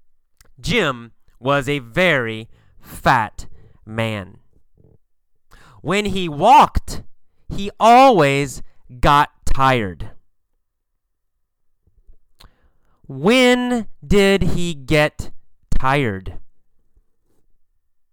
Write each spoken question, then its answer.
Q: When did he get tired?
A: When he walked. When he walked, he got tired.